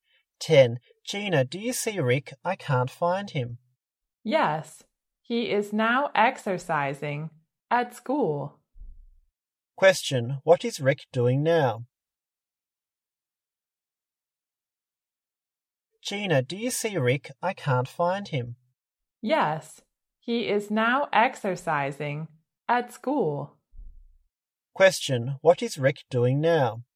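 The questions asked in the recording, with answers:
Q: what is Rick doing now?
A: Exercising at school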